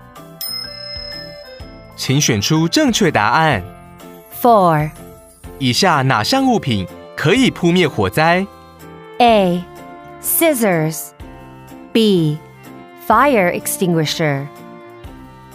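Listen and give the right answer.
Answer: B: Fire extinguisher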